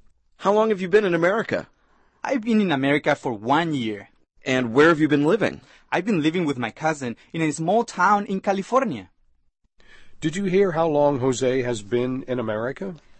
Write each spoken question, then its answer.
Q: Did you hear how long Jose has been in America?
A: 他来美国已经一年了。